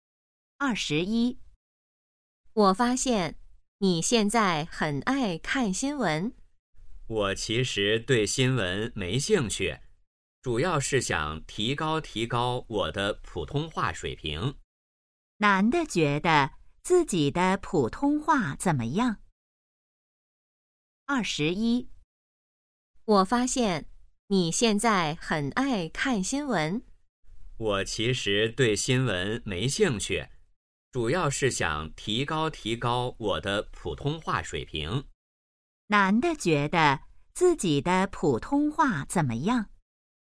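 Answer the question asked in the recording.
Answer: 不太好,需要提高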